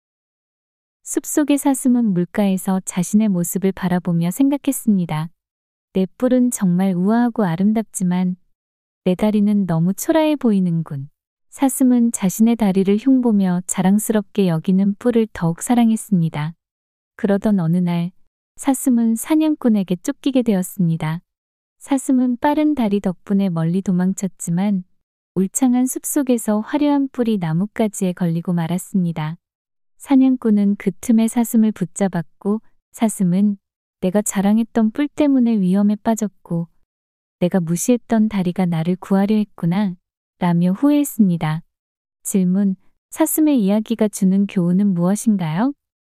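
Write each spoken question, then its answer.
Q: 사슴의 이야기가 주는 교훈은 무엇인가요?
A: 겉모습보다 실제로 쓸모 있는 것이 더 소중하다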